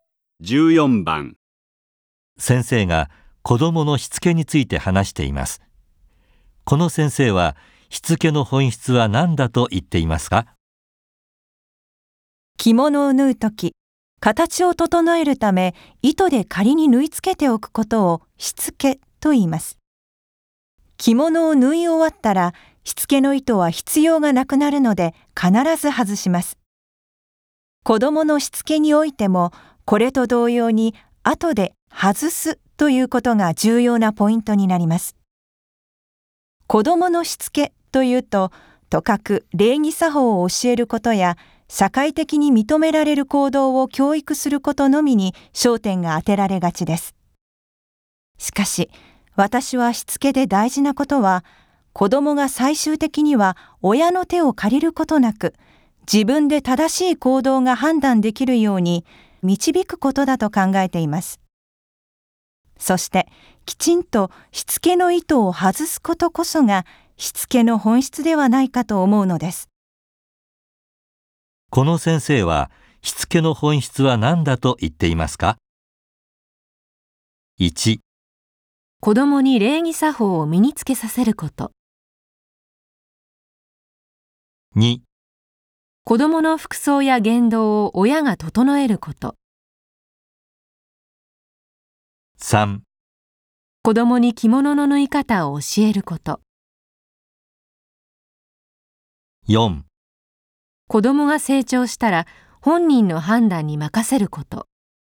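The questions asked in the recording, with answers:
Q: この先生はしつけの本質は何だと言っていますか?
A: 4: 子どもが成長したら本人の判断に任せること。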